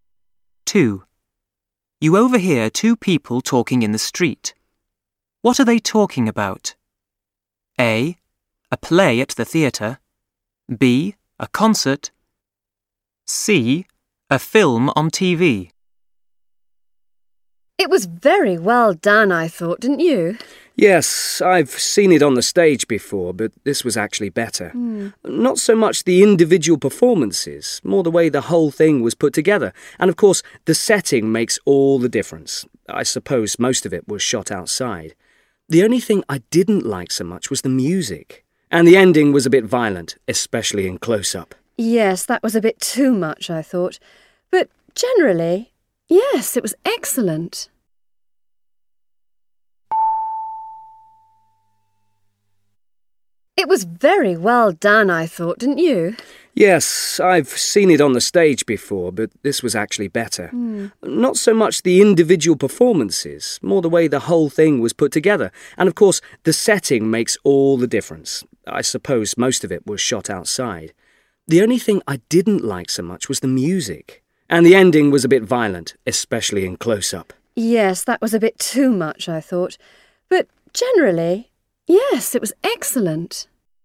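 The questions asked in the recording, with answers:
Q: What are they talking about?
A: C: A film on TV.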